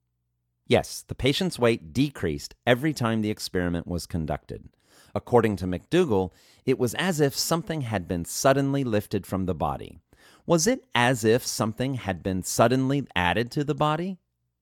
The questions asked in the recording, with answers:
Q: Was it as if something had been suddenly added to the body?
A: No, it was not as if something had suddenly been added to the body.